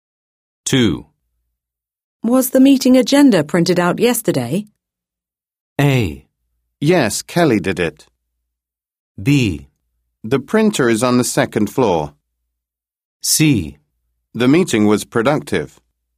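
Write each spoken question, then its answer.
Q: Was the meeting agenda printed out yesterday?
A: A: Yes, Kelly did it.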